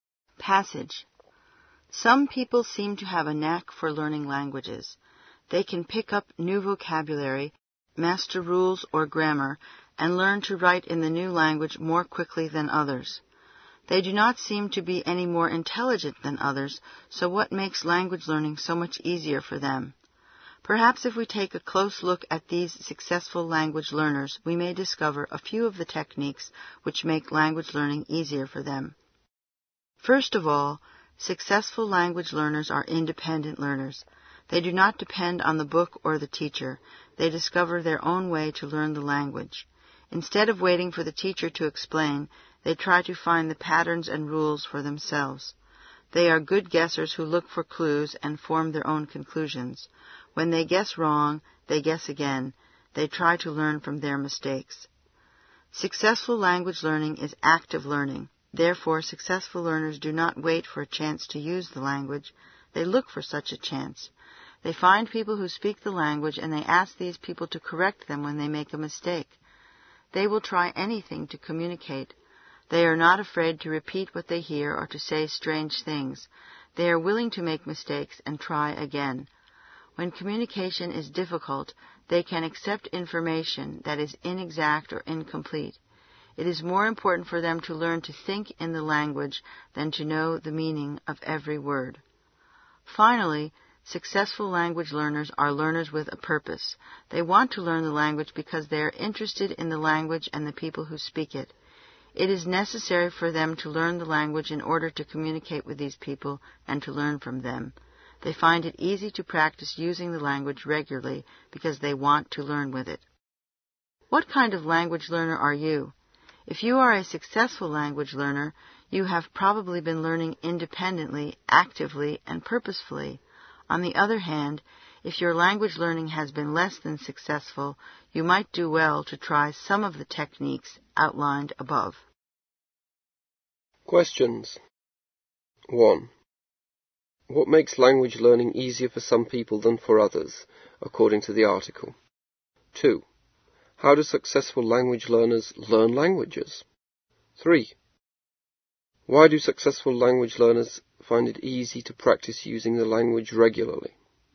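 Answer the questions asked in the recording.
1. The techniques they use: they learn independently, actively and with a purpose.
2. Independently, actively and purposefully.
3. Because they want to learn it and are interested in the language and its speakers.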